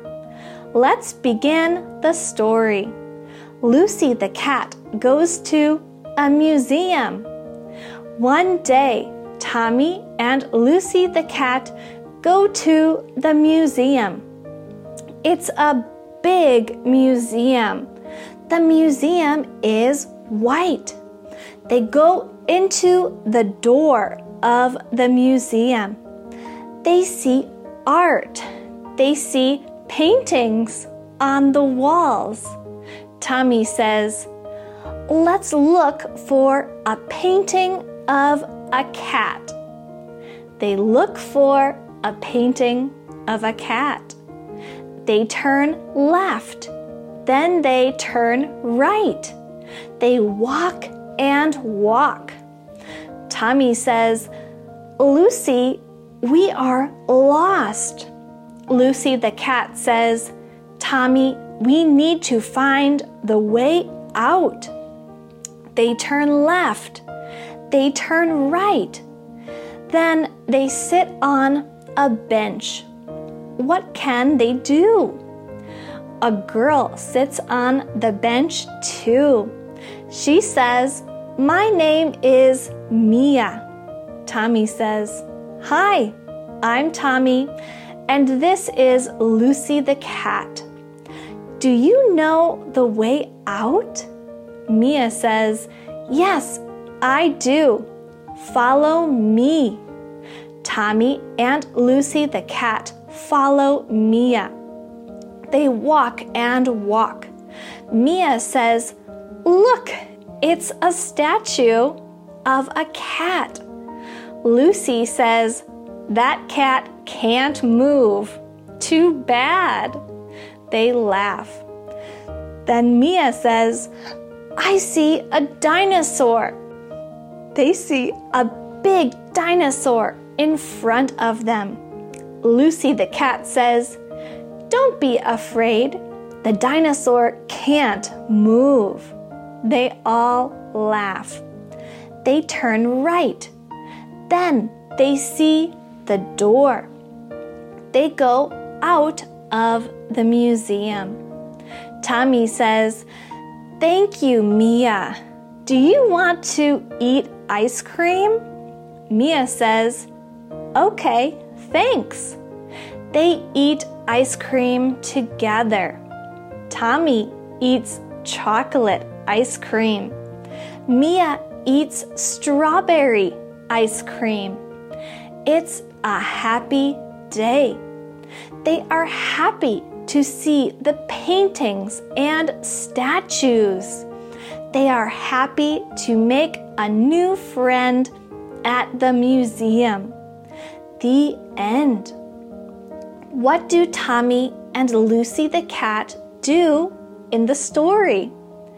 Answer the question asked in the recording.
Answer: 1. They go to the museum. 2. They get lost. 3. They meet Mia. 4. They find the way out. 5. They eat ice cream.